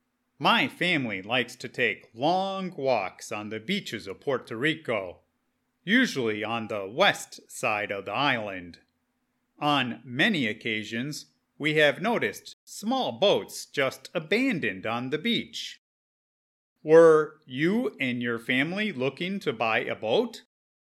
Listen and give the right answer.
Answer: No, we were not looking for boats at all, but we frequently find them abandoned on the beach.